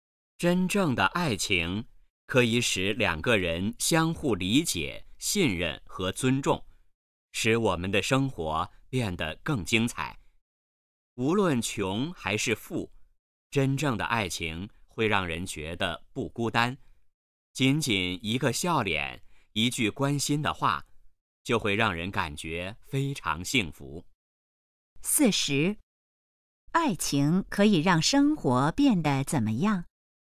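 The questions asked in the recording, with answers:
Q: 爱情可以让生活变得怎么样?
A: 更精彩

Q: 这段话主要谈什么?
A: 真正的爱情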